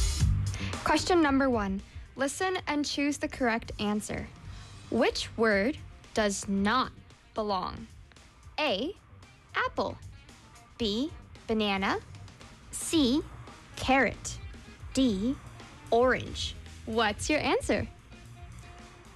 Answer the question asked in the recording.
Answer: C, carrot.